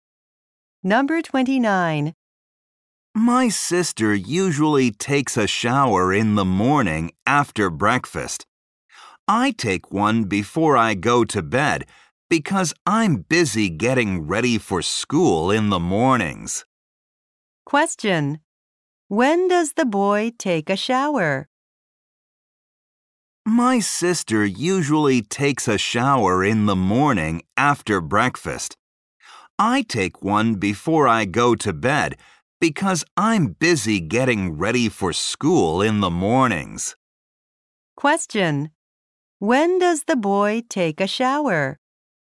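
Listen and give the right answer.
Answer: Before he goes to bed.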